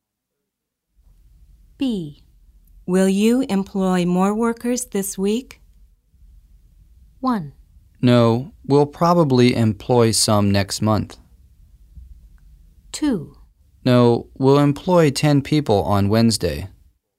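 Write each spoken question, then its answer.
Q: Will you employ more workers this week?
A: 1: No, we'll probably employ some next month.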